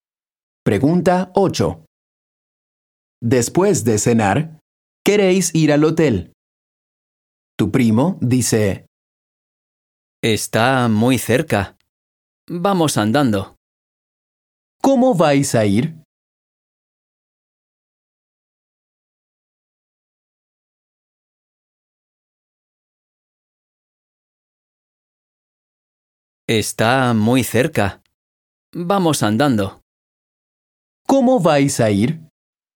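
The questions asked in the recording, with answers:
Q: ¿Cómo vais a ir?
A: Andando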